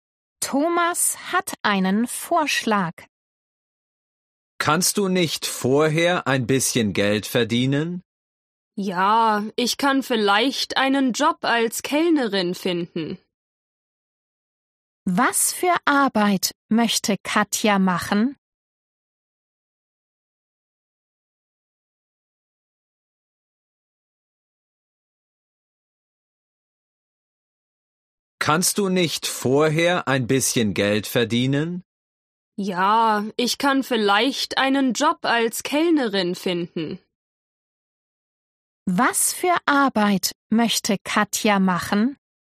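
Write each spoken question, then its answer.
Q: Was für Arbeit möchte Katja machen?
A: Als Kellnerin arbeiten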